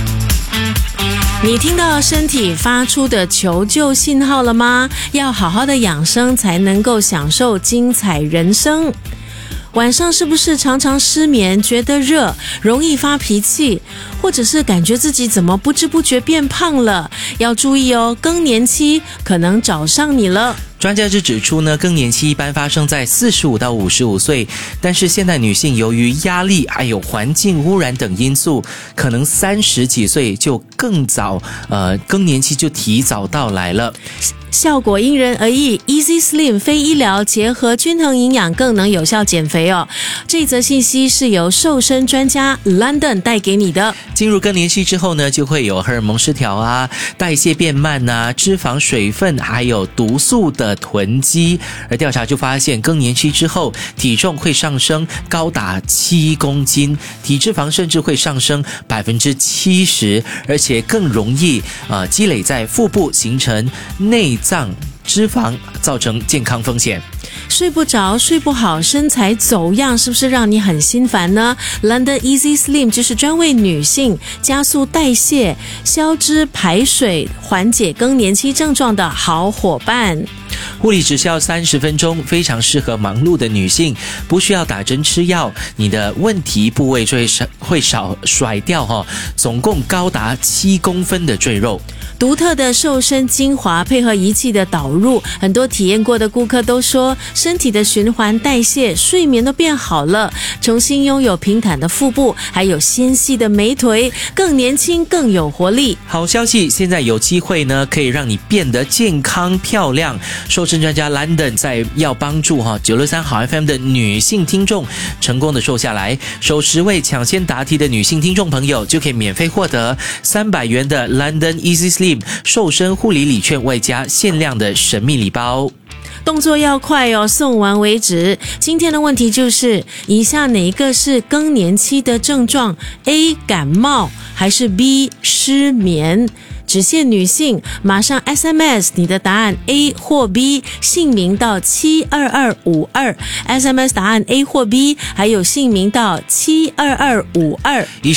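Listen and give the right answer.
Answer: B: 失眠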